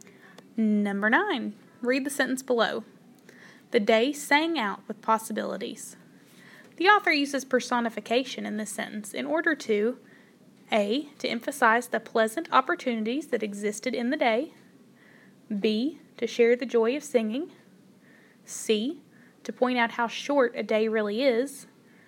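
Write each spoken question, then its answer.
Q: The author uses personification in this sentence in order to A.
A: A: To emphasize the pleasant opportunities that existed in the day.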